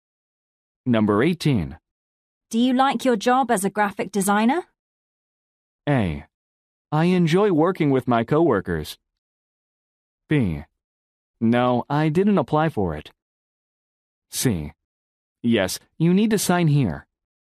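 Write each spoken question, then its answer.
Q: Do you like your job as a graphic designer?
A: A: I enjoy working with my coworkers.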